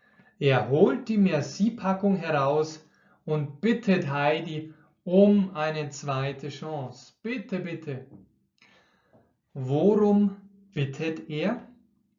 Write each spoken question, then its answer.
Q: Bitte, bitte. Worum bittet er?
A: Um eine zweite Chance. Er bittet um eine zweite Chance.